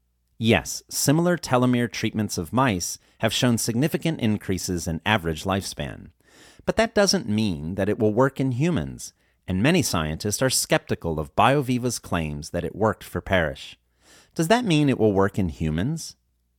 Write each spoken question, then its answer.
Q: Does that mean it will work in humans?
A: No, that doesn't mean it will work in humans.